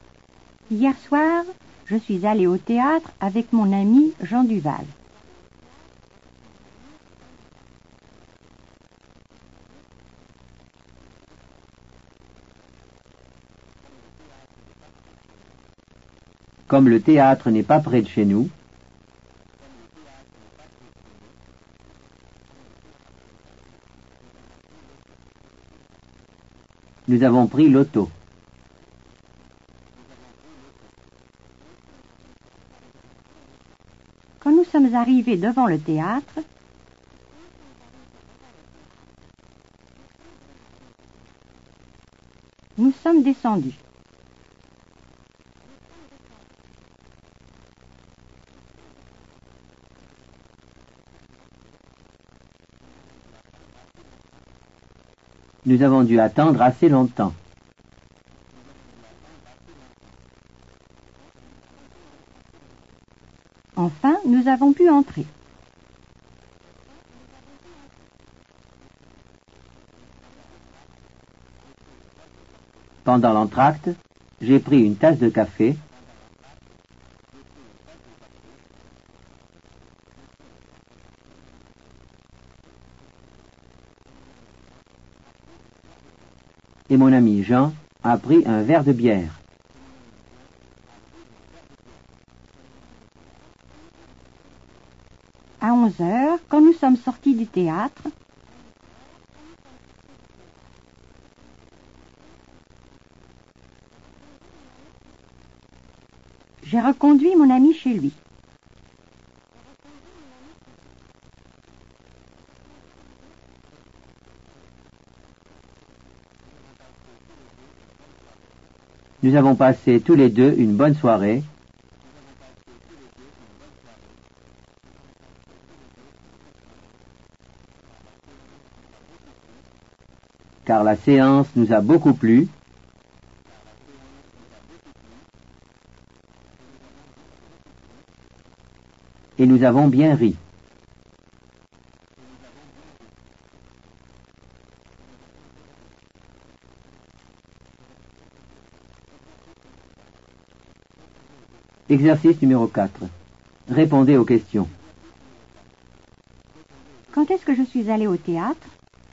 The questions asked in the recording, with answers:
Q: Quand est-ce que je suis allée au théâtre?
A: Vous êtes allée au théâtre hier soir.